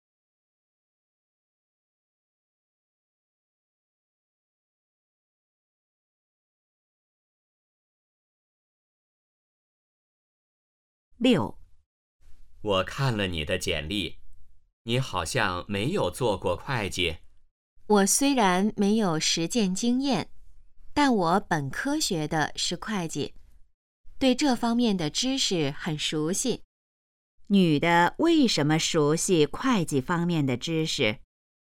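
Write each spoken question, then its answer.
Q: 女的为什么熟悉会计方面的知识?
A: 她本科学的是会计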